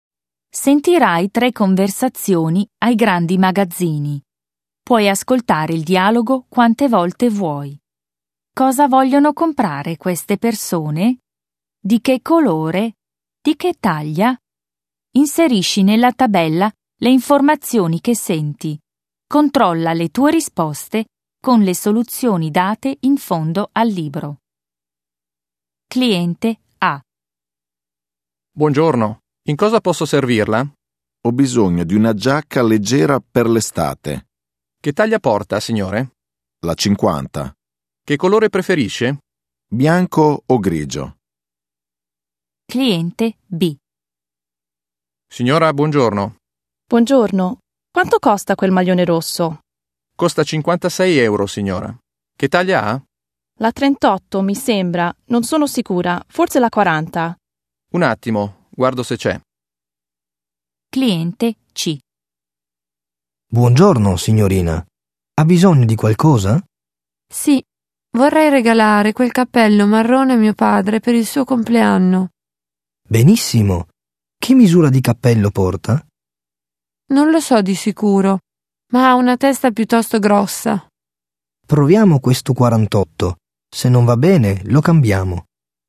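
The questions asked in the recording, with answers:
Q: Cosa vogliono comprare queste persone?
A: A: una giacca leggera; B: un maglione; C: un cappello

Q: Di che colore?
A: A: bianco o grigio; B: rosso; C: marrone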